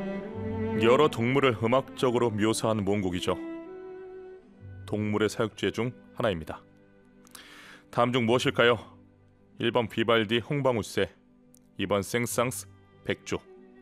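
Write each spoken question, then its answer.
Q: 다음 중 무엇일까요?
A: 2번: 생상스 백조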